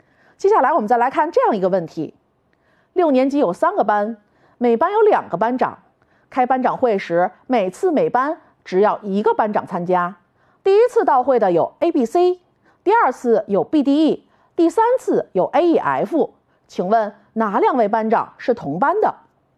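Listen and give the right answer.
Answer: A和D同班,B和F同班,C和E同班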